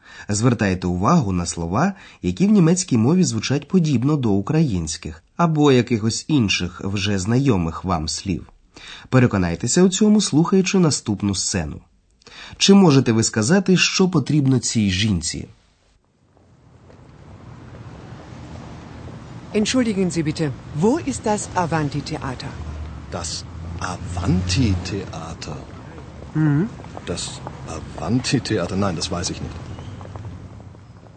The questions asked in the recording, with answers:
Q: Чи можете ви сказати, що потрібно цій жінці?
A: Отже, жінка запитує, де знаходиться театр, театр під назвою Аванті.